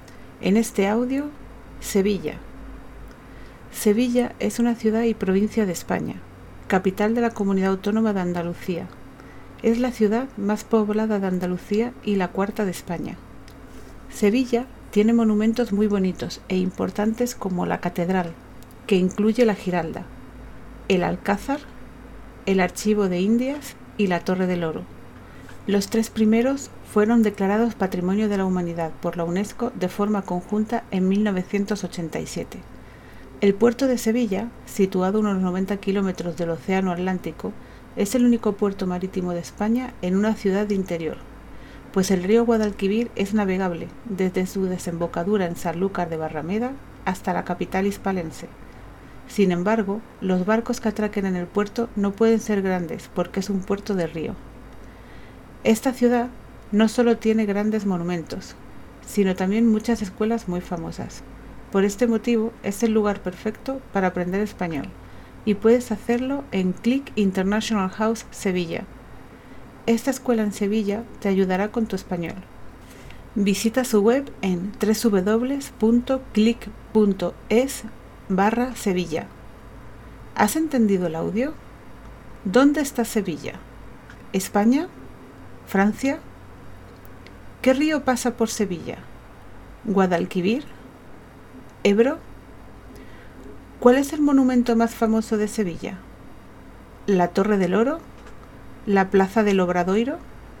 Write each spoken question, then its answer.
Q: ¿Dónde está Sevilla?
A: España

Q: ¿Qué río pasa por Sevilla?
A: Guadalquivir